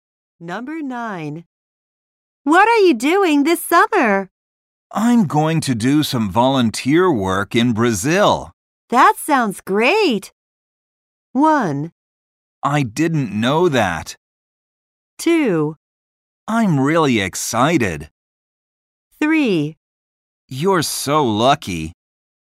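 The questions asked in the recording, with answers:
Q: That sounds great.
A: 2: I'm really excited.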